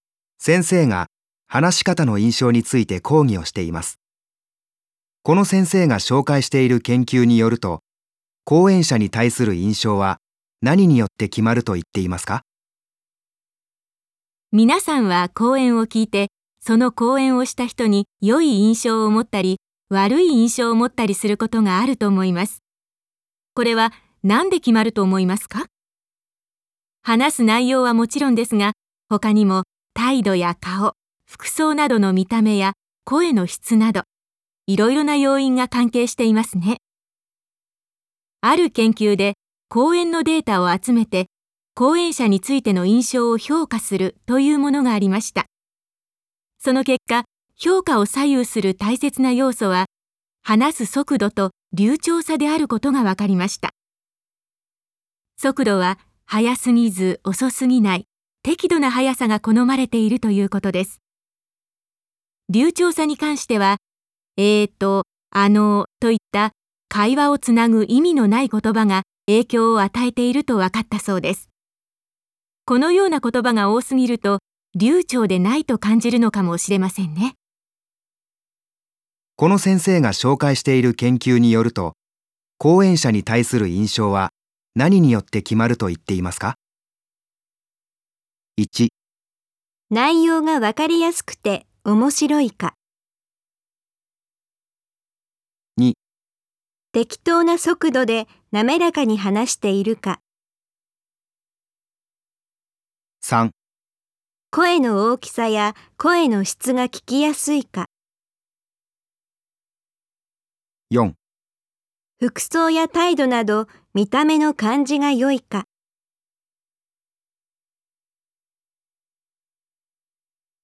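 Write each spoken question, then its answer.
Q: この先生が紹介している研究によると、講演者に対する印象は何によって決まると言っていますか?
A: 2: 適当な速度で滑らかに話しているか。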